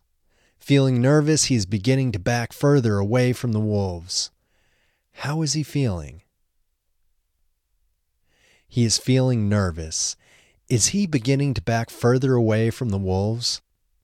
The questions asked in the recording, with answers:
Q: Is he beginning to back further away from the wolves?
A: Yes, he is beginning to back further away from the wolves.